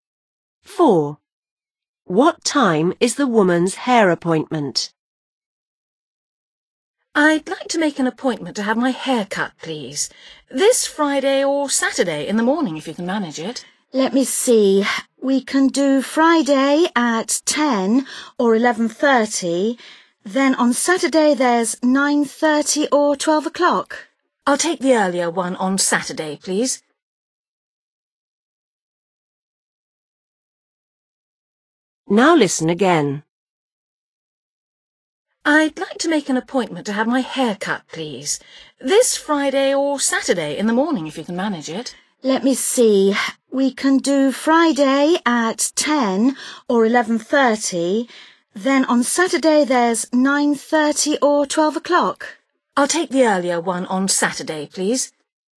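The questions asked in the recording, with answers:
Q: What time is the woman's hair appointment?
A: 9:30 on Saturday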